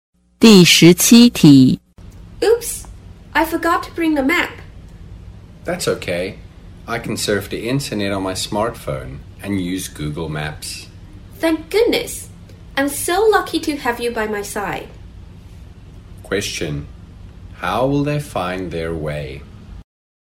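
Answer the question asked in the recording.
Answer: By using Google Maps on a smartphone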